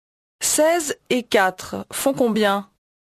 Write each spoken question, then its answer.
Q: 16 et 4 font combien?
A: 20.